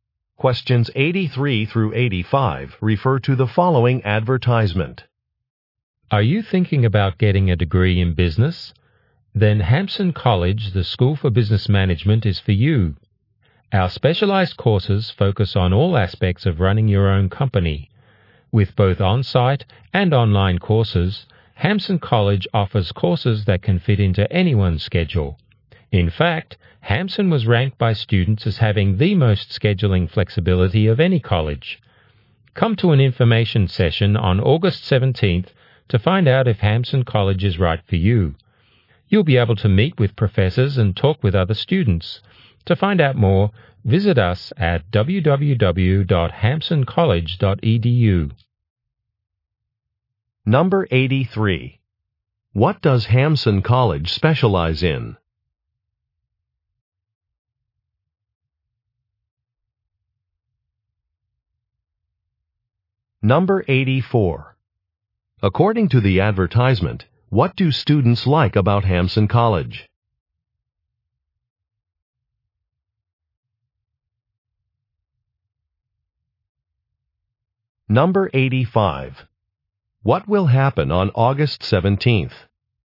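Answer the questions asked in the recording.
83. Business management
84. Its scheduling flexibility
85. An information session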